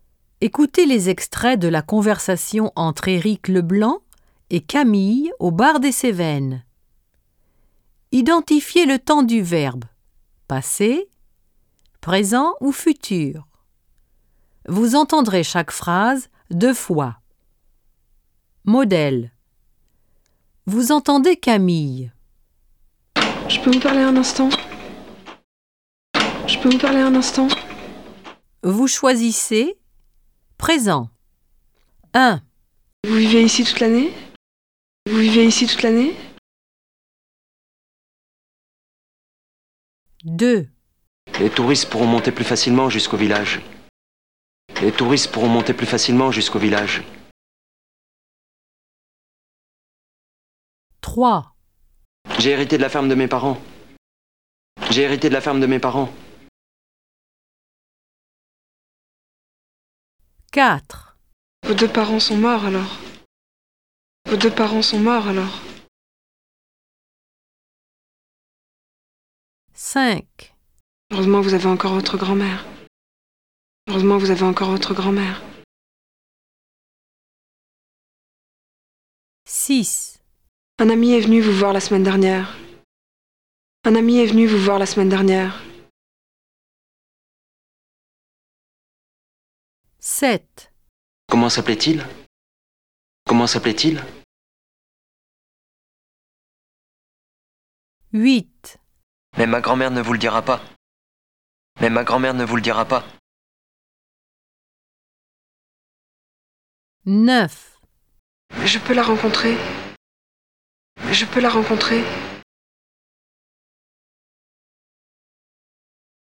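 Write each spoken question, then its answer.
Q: Vous vivez ici toute l'année ?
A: présent

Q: Les touristes pourront monter plus facilement jusqu'au village.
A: futur

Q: J'ai hérité de la ferme de mes parents.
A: passé

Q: Heureusement, vous avez encore votre grand-mère.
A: présent

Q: Un ami est venu vous voir la semaine dernière.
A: passé

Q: Comment s'appelait-il ?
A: passé

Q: Mais ma grand-mère ne vous le dira pas.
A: futur

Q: Je peux la rencontrer.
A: présent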